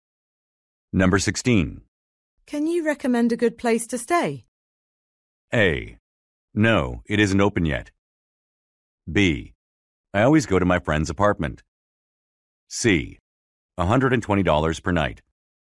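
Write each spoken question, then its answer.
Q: Can you recommend a good place to stay?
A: B: I always go to my friend's apartment.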